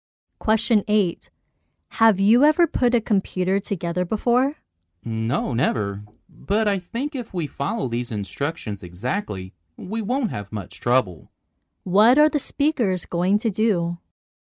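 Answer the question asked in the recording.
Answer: Put a computer together by following the instructions.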